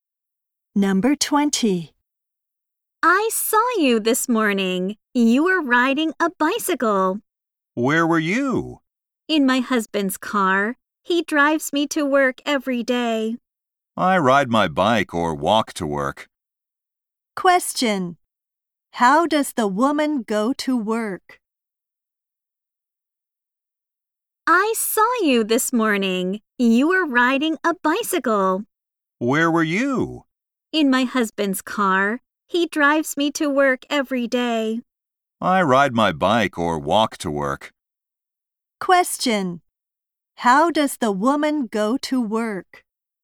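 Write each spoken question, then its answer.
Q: How does the woman go to work?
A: Her husband drives her by car.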